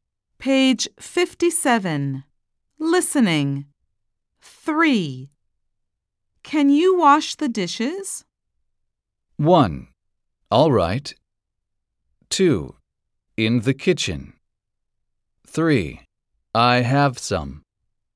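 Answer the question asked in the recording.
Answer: 1: All right.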